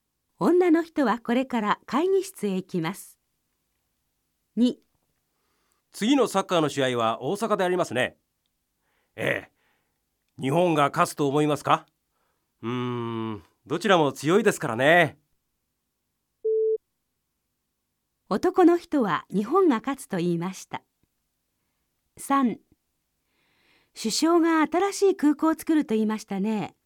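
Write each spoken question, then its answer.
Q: 男の人は日本が勝つと言いました。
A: いいえ(×)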